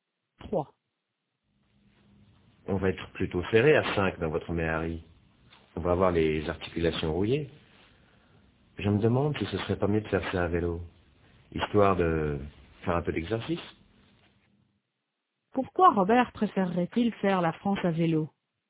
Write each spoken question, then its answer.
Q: Pourquoi Robert préférerait-il faire la France à vélo?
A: Pour faire un peu d'exercice.